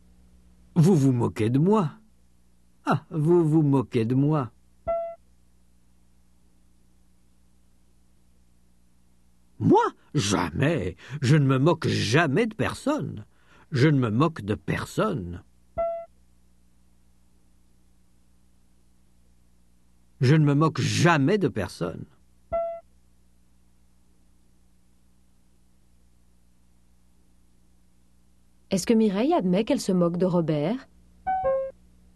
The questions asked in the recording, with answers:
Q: Est-ce que Mireille admet qu'elle se moque de Robert?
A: Non. Elle ne se moque jamais de personne.